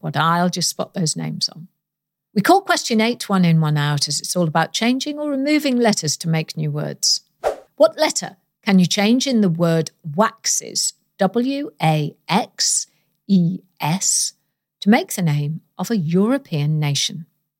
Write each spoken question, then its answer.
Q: What letter can you change in the word waxes,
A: change the letter X for a letter L and you get my beloved home country of Wales, W-A-L-E-S.